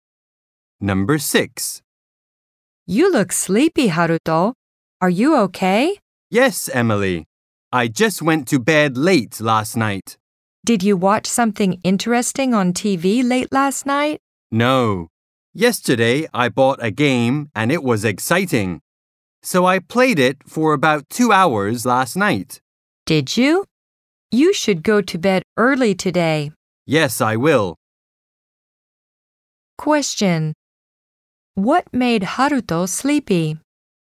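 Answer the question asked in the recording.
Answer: Playing a new game late last night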